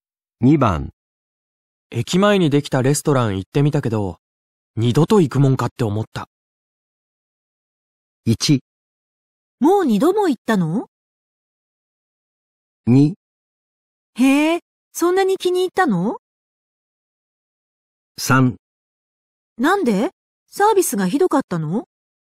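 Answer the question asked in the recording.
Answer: 3: なんでサービスがひどかったの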